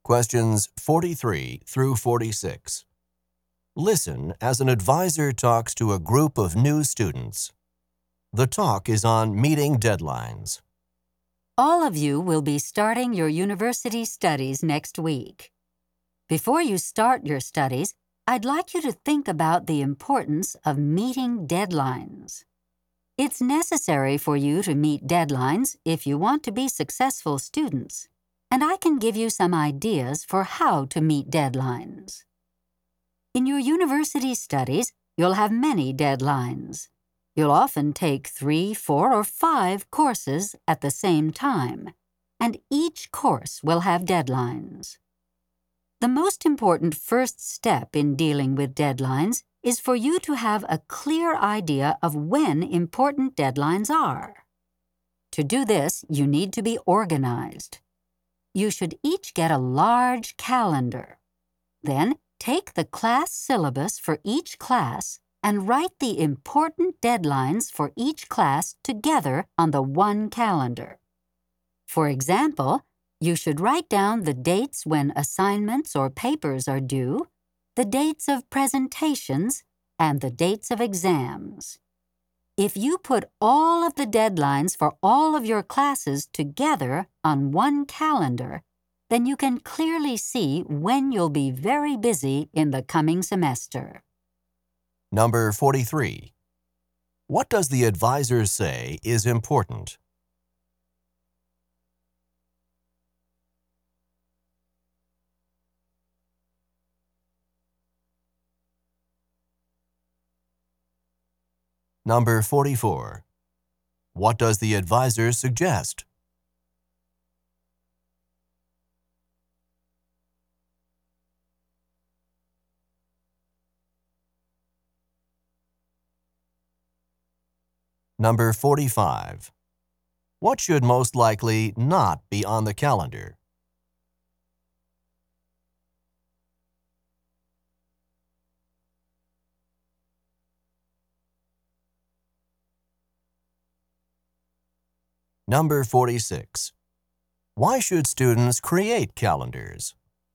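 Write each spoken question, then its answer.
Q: What does the advisor say is important?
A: Meeting deadlines

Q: What does the advisor suggest?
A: Getting a large calendar and writing all class deadlines on it

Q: Why should students create calendars?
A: To see clearly when they will be very busy in the semester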